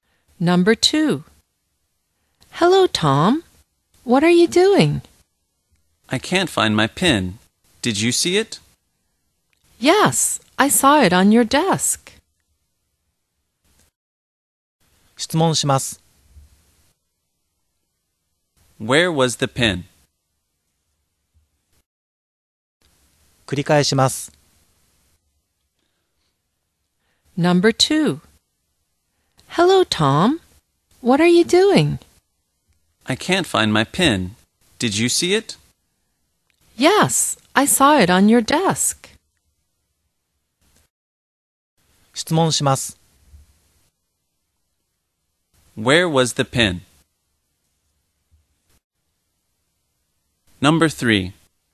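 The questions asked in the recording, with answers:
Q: Where was the pen?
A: On Tom's desk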